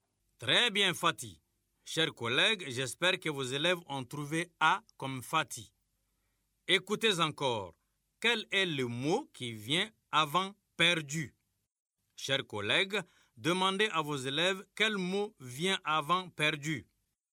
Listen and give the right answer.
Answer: Monsieur, c'est tout.